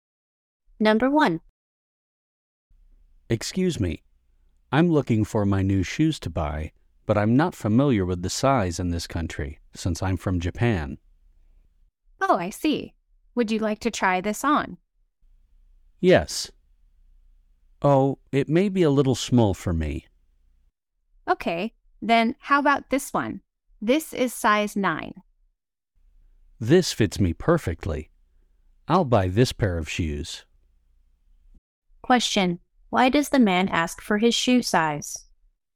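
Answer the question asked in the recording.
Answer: Because he is from Japan and isn't familiar with shoe sizes in this country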